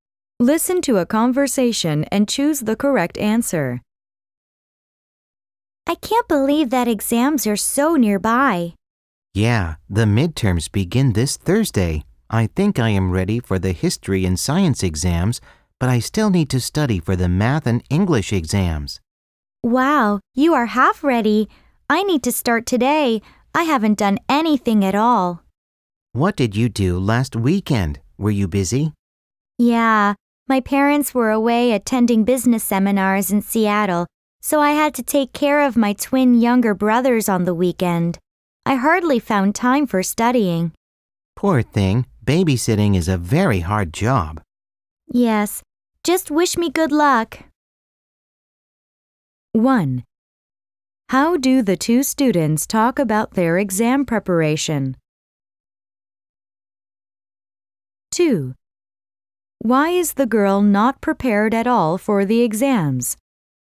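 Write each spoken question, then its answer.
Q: Why is the girl not prepared at all for the exams?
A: She had to take care of her twin younger brothers last weekend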